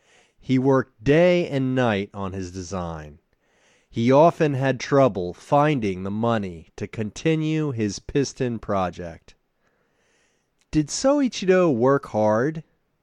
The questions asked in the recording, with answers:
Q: Did Soichiro work hard?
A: Yes, Soichiro worked day and night on his design.